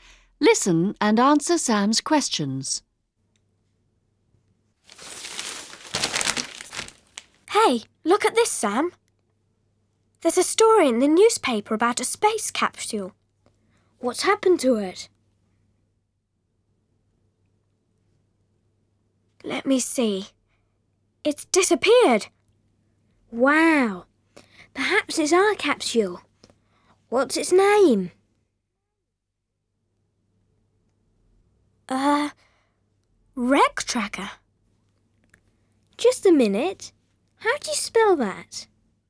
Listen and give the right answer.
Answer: WRECKTRACKER.